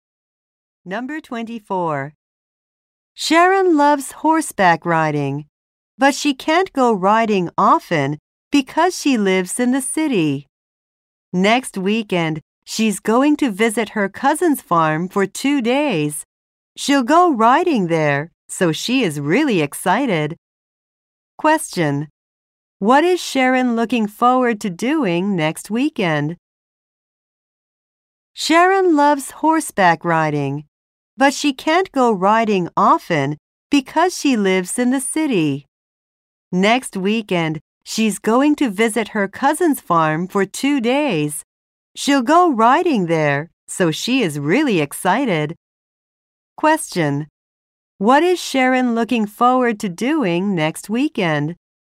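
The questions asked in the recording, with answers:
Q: What is Sharon looking forward to doing next weekend?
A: Going horseback riding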